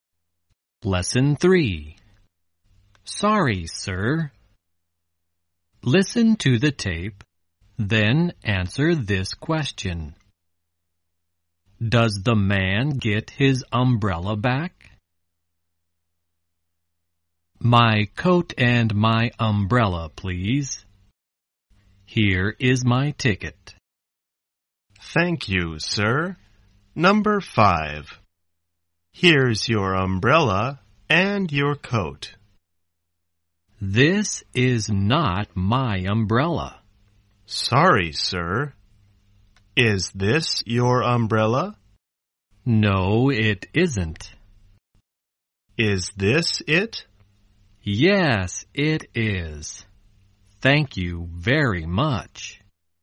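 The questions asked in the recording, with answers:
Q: Does the man get his umbrella back?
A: Yes, he does.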